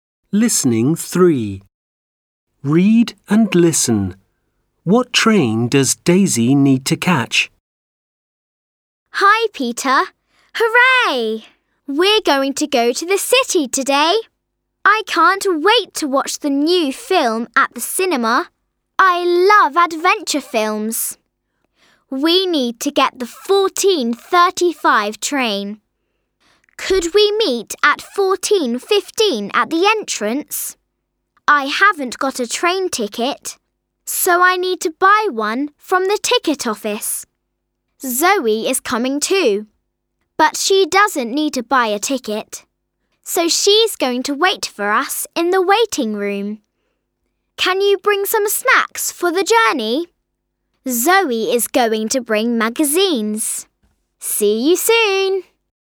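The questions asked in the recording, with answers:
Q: What train does Daisy need to catch?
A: The 14:35 train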